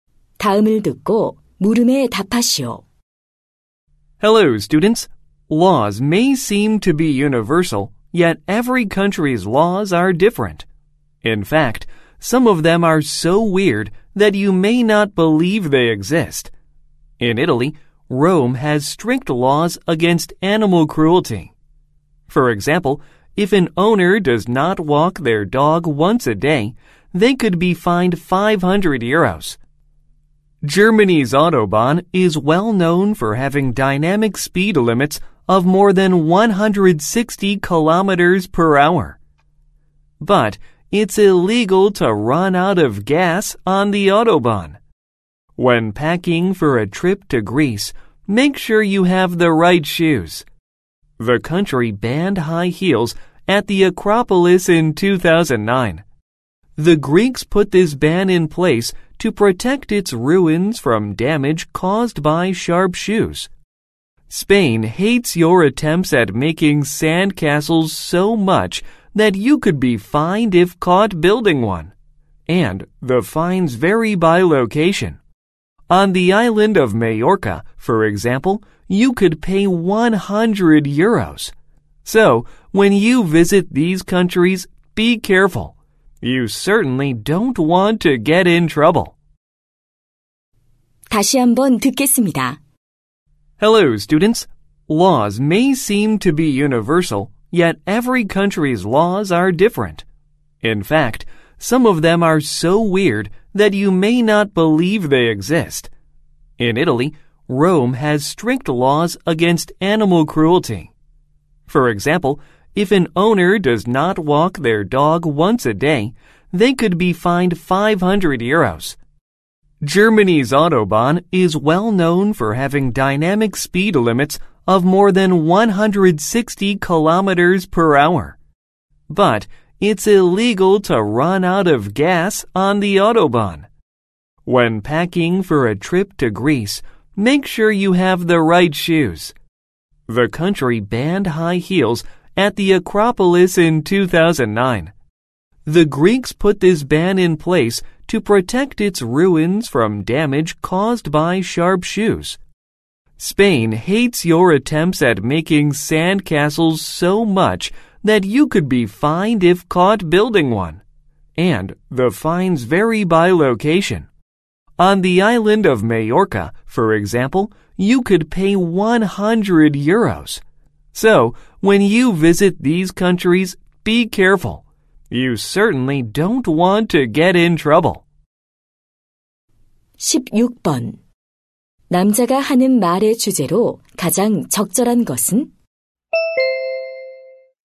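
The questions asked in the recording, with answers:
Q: 남자가 하는 말의 주제로 가장 적절한 것은?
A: 여러 나라의 이상한 법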